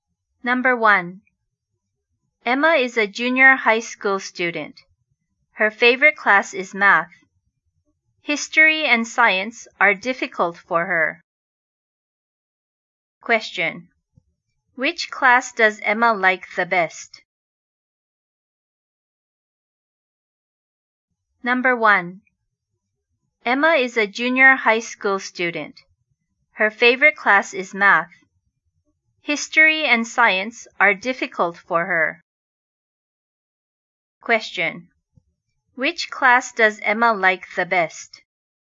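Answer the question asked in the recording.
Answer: Math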